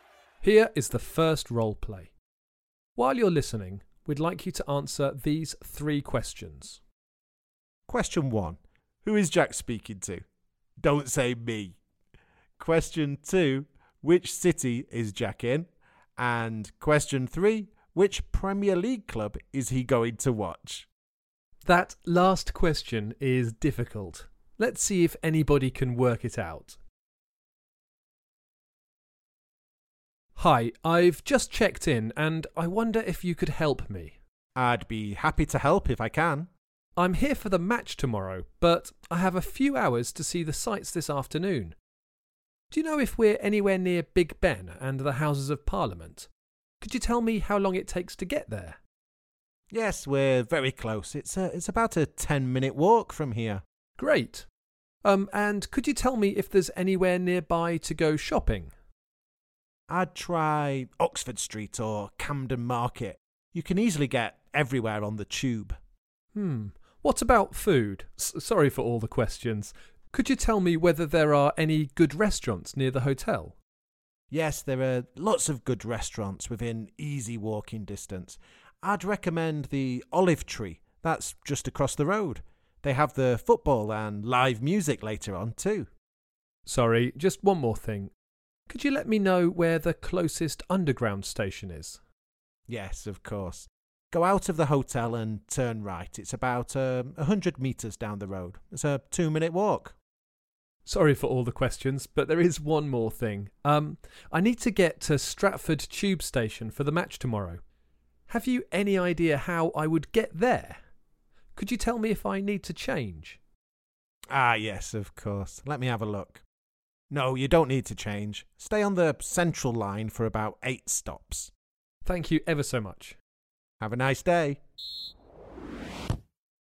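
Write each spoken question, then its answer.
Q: who is Jack speaking to?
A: a hotel receptionist

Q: which city is Jack in?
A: London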